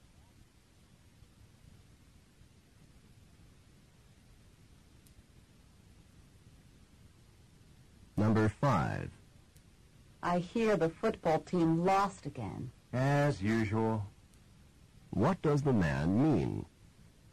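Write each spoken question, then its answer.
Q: What does the man mean?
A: The team often loses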